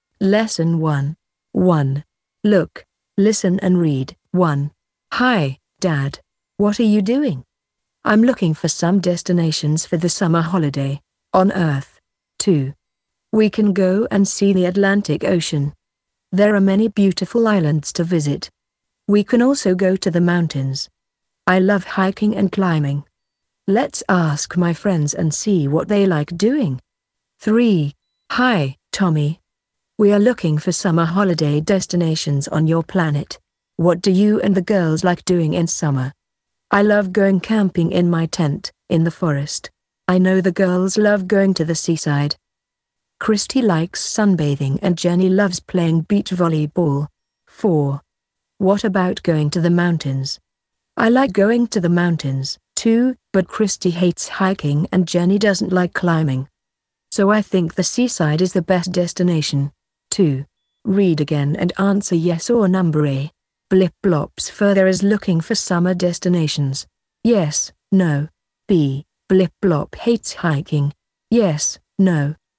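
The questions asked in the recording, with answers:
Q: Blip Blop's further is looking for summer destinations.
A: Yes

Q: Blip Blop hates hiking.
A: No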